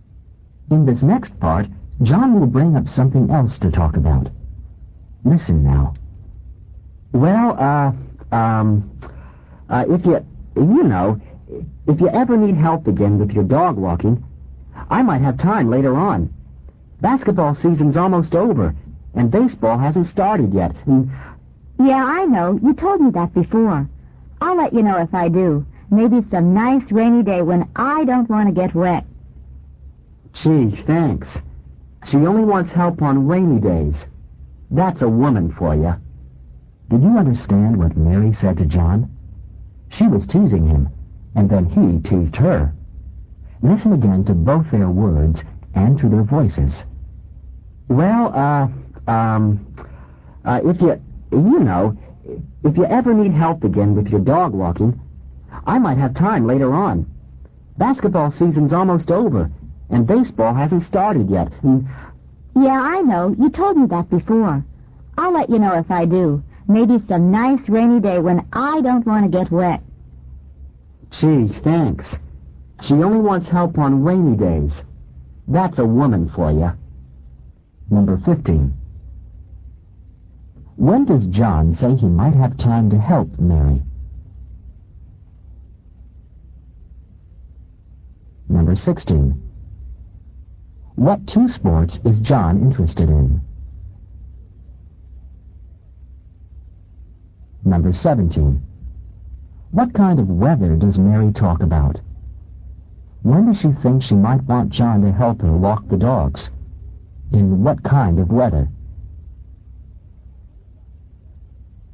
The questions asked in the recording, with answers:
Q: When does John say he might have time to help Mary?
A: Number 15. He might have time later on.

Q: What two sports is John interested in?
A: Number 16. Basketball and baseball.

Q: What kind of weather does Mary talk about?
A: Number 17. In rainy.